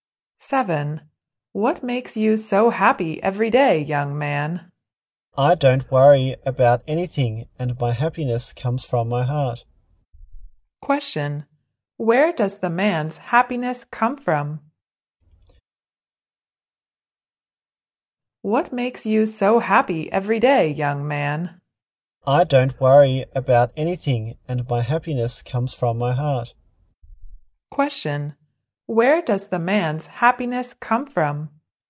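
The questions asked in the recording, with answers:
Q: Where does the man's happiness come from?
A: From his heart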